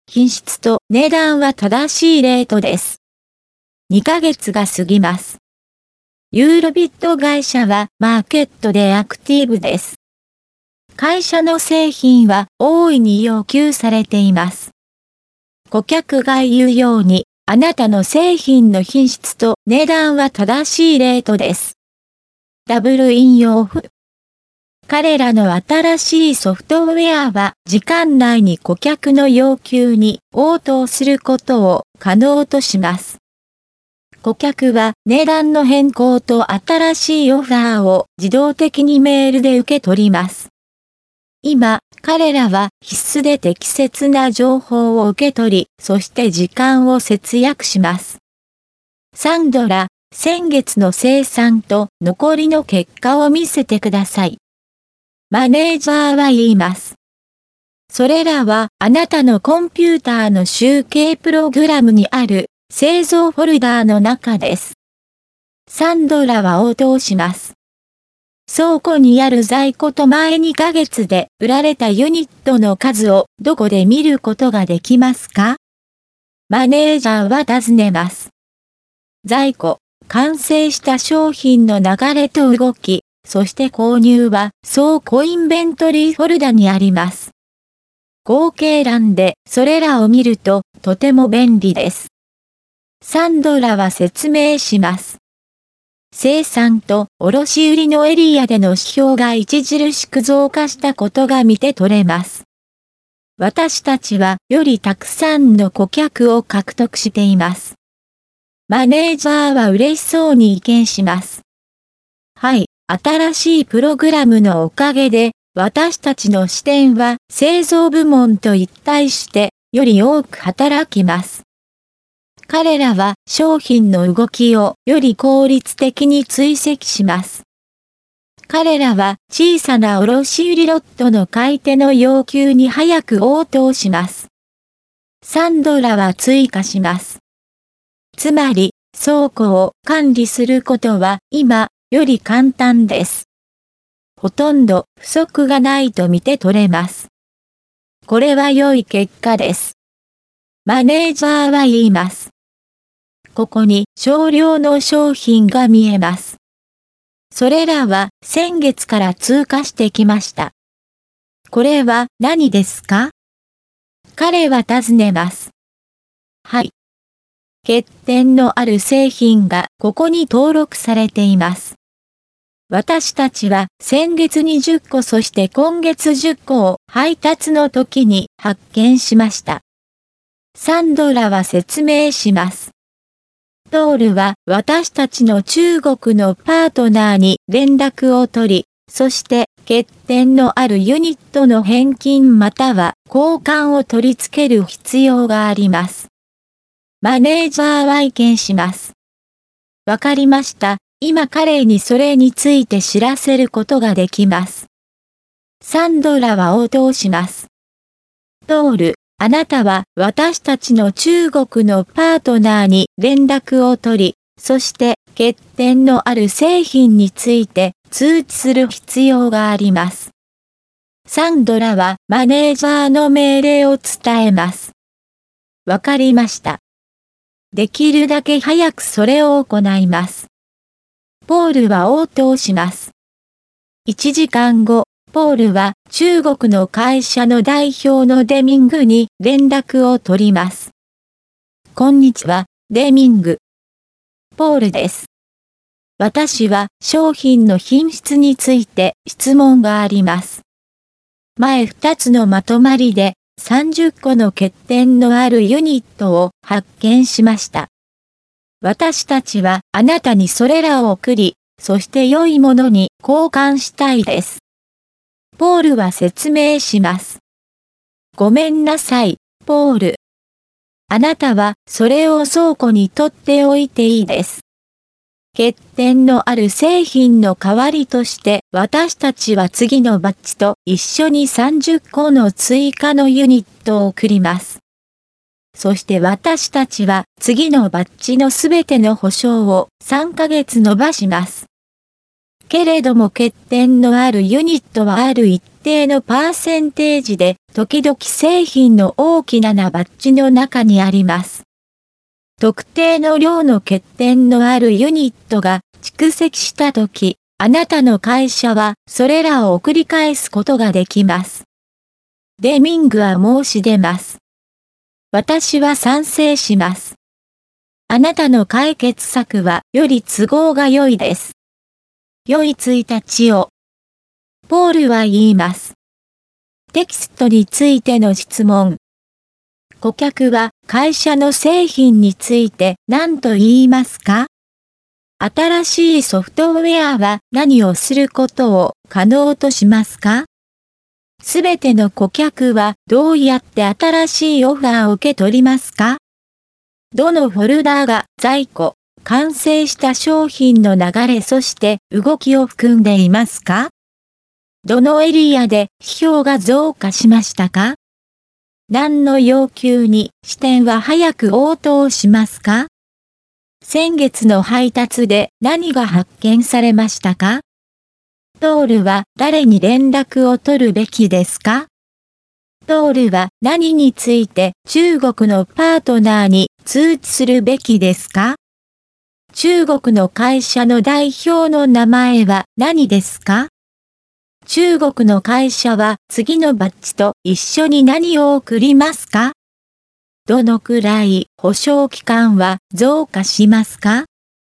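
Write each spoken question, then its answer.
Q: 顧客は会社の製品について何と言いますか?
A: 品質と値段は正しいレートです

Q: 新しいソフトウェアは何をすることを可能としますか?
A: 時間内に顧客の要求に応答すること

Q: すべての顧客はどうやって新しいオファーを受け取りますか?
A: 自動的にメールで

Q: どのフォルダーが在庫、完成した商品の流れそして動きを含んでいますか?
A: 倉庫インベントリーフォルダ

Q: どのエリアで批評が増加しましたか?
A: 生産と卸売のエリア

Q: 何の要求に支店は早く応答しますか?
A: 小さな卸売ロットの買い手の要求

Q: 先月の配達で何が発見されましたか?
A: 欠点のある製品20個

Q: ポールは誰に連絡を取るべきですか?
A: 中国のパートナー

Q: ポールは何について中国のパートナーに通知するべきですか?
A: 欠点のある製品について

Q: 中国の会社の代表の名前は何ですか?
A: デミング

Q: 中国の会社は次のバッジと一緒に何を送りますか?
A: 30個の追加のユニット

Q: どのくらい保証期間は増加しますか?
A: 3ヶ月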